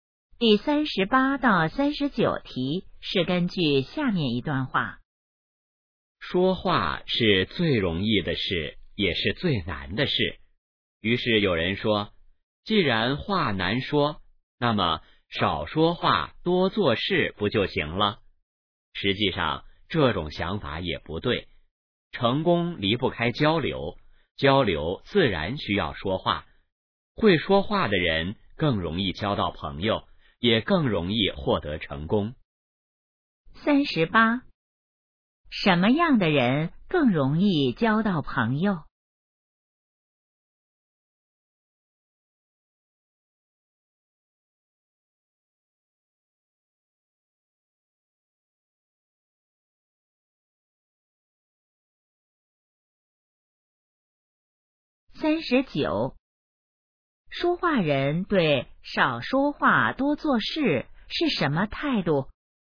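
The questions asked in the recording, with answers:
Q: 什么样的人更容易交到朋友?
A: 会说话的人

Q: 说话人对少说话多做事是什么态度?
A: 不同意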